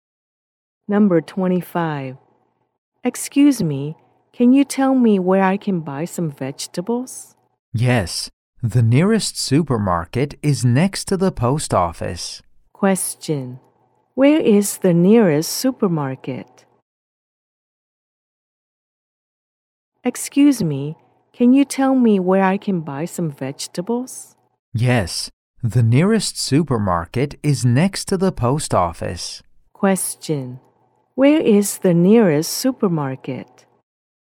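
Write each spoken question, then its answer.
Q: Where is the nearest supermarket?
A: Next to the post office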